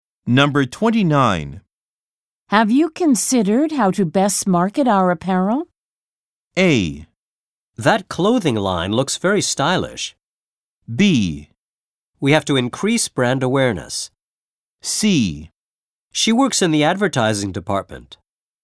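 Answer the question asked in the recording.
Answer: B: We have to increase brand awareness.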